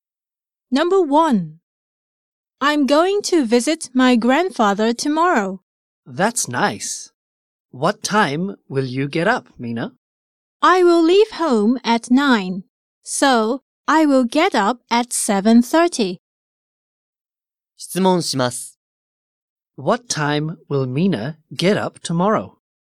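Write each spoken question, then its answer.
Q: What time will Mina get up tomorrow?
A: At 7:30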